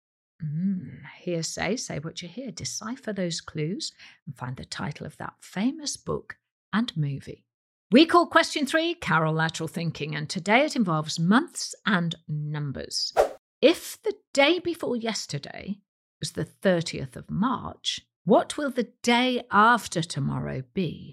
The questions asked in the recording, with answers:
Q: If the day before yesterday was the 30th of March, what will the day after tomorrow be?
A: The answer is the 3rd of April.